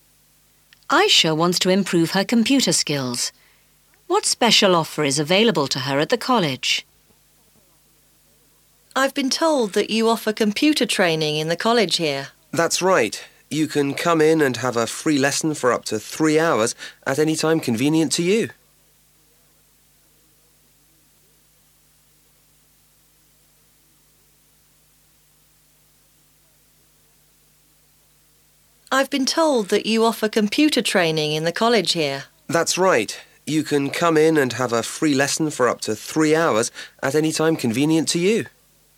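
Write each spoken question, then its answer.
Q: What special offer is available to her at the college?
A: A free lesson of up to 3 hours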